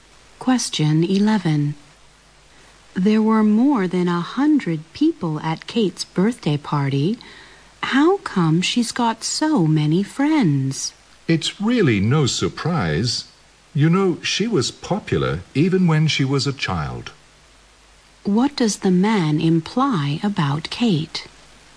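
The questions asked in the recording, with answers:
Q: What does the man imply about Kate?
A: She has always been popular, even as a child.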